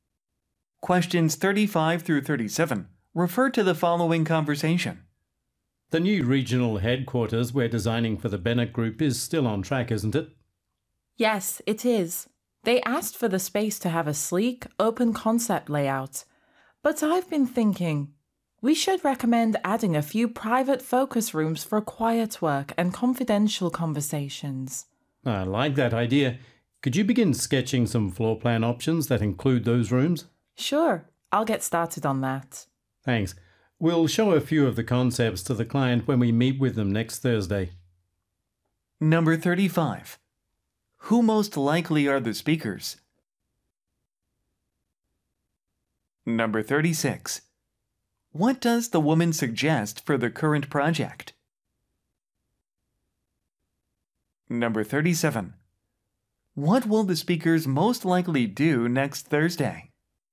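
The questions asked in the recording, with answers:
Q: Who most likely are the speakers?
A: Designers of office buildings (architects)

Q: What does the woman suggest for the current project?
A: Adding a few private focus rooms

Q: What will the speakers most likely do next Thursday?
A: Show floor plan concepts to the client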